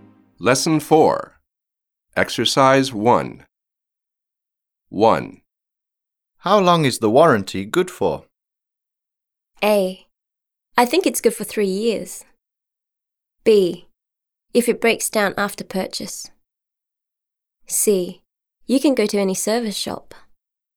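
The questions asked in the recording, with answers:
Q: How long is the warranty good for?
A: A: I think it's good for 3 years.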